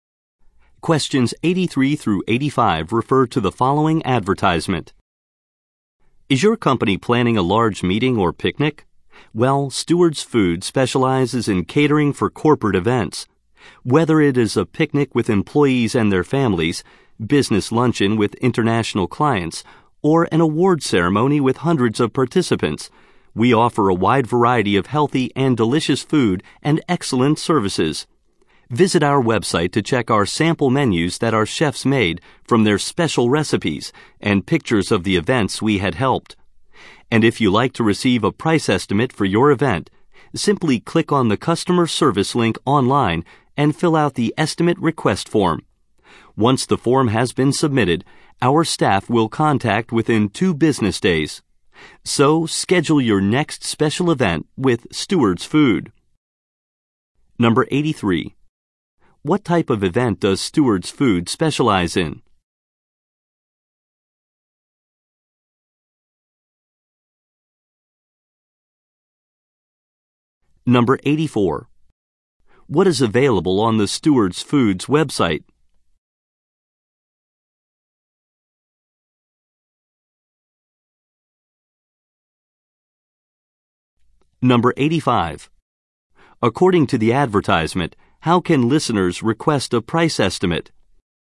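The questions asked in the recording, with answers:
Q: What type of event does Stewards Food specialize in?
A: Corporate events

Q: What is available on the Stewards Foods website?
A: Sample menus and event pictures

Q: According to the advertisement, how can listeners request a price estimate?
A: By filling out an online form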